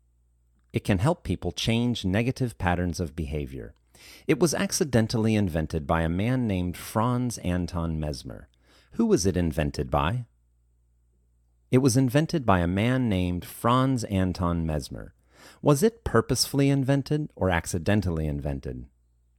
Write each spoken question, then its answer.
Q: Was it purposefully invented or accidentally invented?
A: It was accidentally invented.